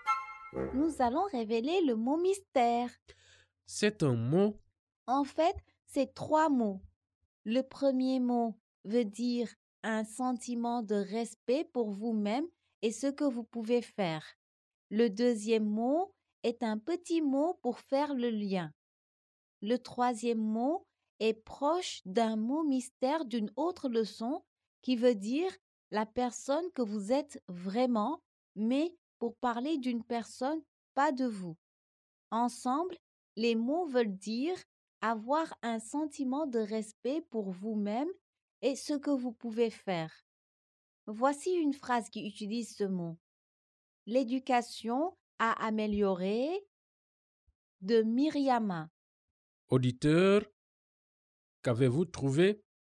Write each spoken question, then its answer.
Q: Auditeur, qu'avez-vous trouvé?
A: Le mot mystère est estime de soi.